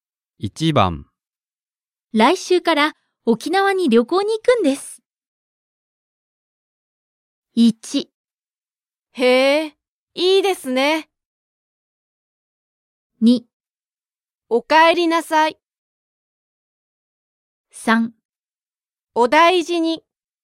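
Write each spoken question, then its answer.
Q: 来週から沖縄に旅行に行くんです。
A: 1: へえ、いいですね。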